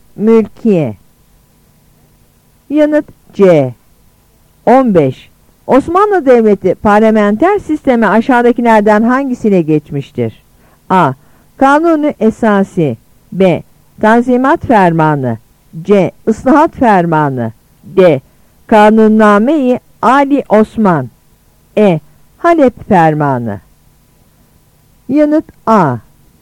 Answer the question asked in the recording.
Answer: Yanıt A.